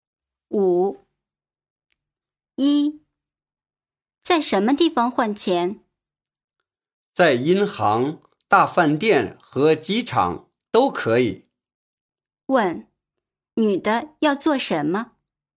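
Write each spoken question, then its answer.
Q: 问,女的要做什么?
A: 换钱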